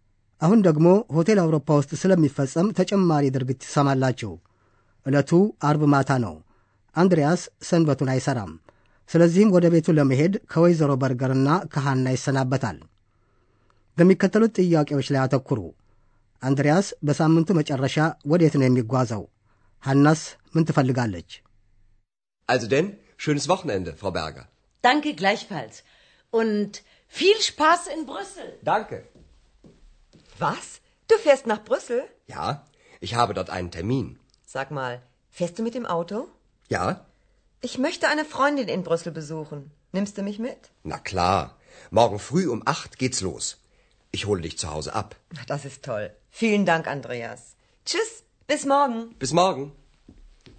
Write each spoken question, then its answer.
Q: አንድሪያስ በሳምንቱ መጨረሻ ወዴት ነው የሚጓዘው?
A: አንድሪያስ በሳምንቱ መጨረሻ በመኪና ወደ ብራስልስ ይጓዛል።

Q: ሃናስ ምን ትፈልጋለች?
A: በዚያ የምትገኝ ባልንጀራዋን መጠየቅ የምትፈልገው ሐናም አብራው ትሄዳለች።